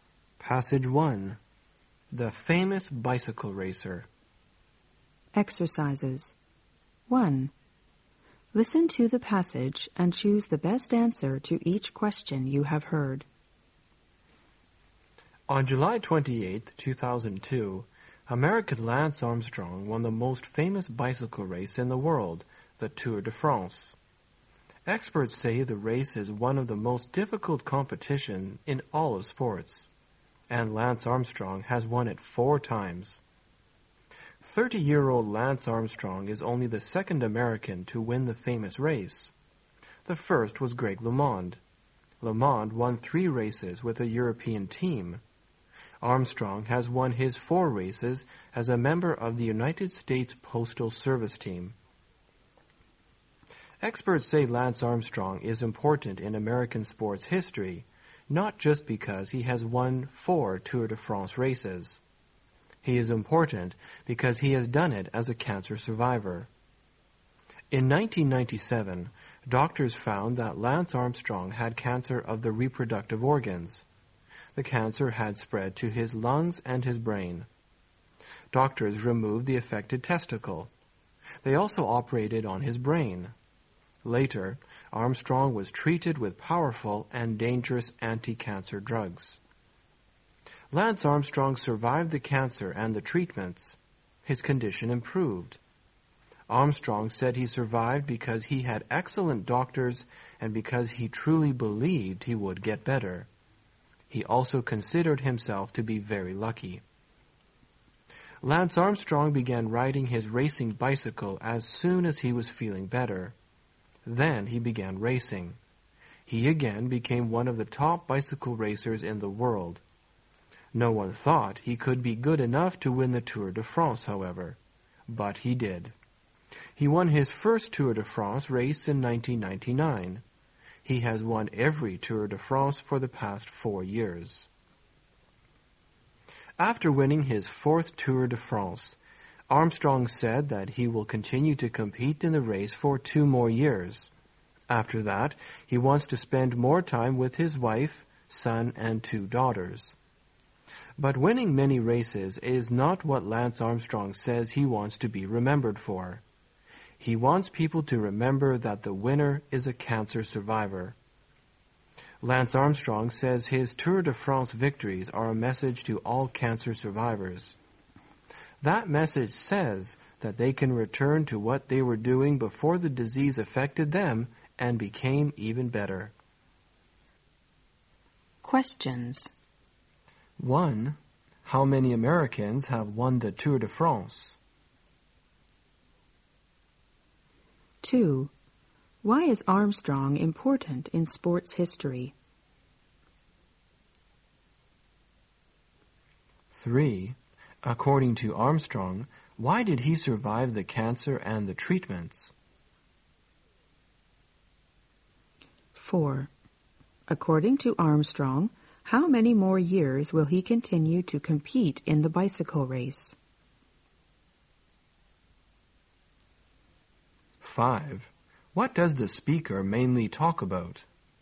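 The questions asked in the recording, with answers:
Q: How many Americans have won the Tour de France?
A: Two

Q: Why is Armstrong important in sports history?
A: He has won the Tour de France as a cancer survivor

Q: According to Armstrong, why did he survive the cancer and the treatments?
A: He had excellent doctors and truly believed he would get better

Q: According to Armstrong, how many more years will he continue to compete in the bicycle race?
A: Two more years

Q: What does the speaker mainly talk about?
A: Lance Armstrong, a cancer survivor who won the Tour de France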